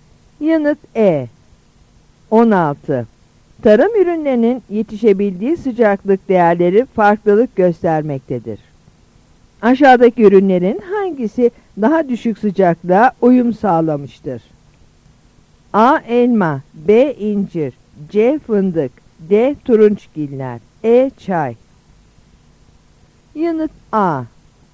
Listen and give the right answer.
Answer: Yanıt A.